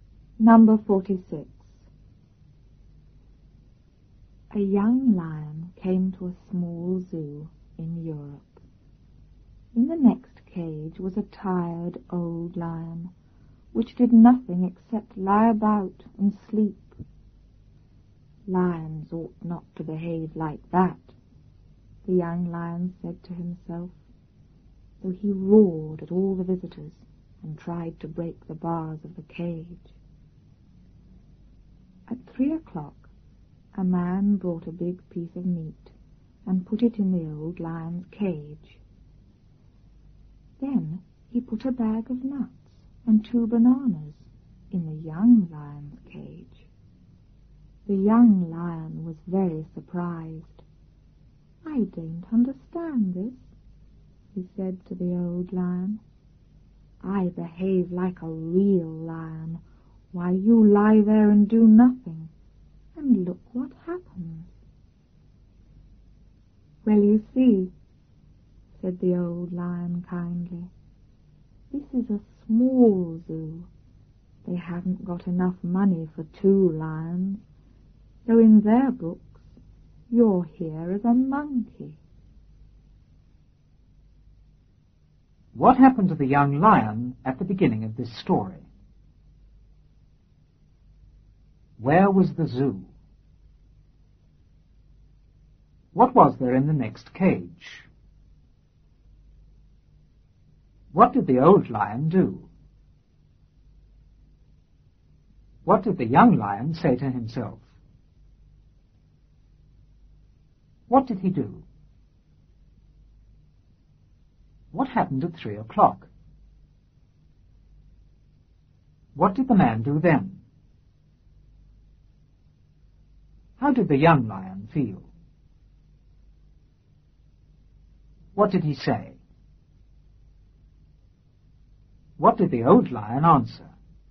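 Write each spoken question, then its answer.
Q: What happened to the young lion at the beginning of this story?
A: He came to a small zoo in Europe.

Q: Where was the zoo?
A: In Europe.

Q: What was there in the next cage?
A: A tired old lion.

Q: What did the old lion do?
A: Nothing except lie about and sleep.

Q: What did the young lion say to himself?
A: Lions ought not to behave like that.

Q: What did he do?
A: He roared at the visitors and tried to break the bars of the cage.

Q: What happened at 3 o'clock?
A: A man brought a big piece of meat and put it in the old lion's cage.

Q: What did the man do then?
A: He put a bag of nuts and 2 bananas in the young lion's cage.

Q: How did the young lion feel?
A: Very surprised.

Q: What did he say?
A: I don't understand this. I behave like a real lion, you do nothing, and look what happens.

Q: What did the old lion answer?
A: It's a small zoo without money for 2 lions, so in their books the young lion is a monkey.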